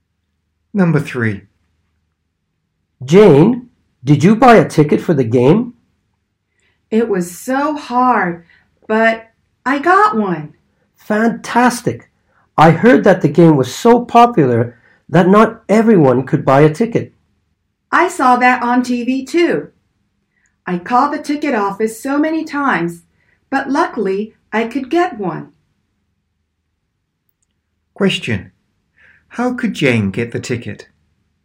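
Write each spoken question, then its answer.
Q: How could Jane get the ticket?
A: By calling the ticket office many times.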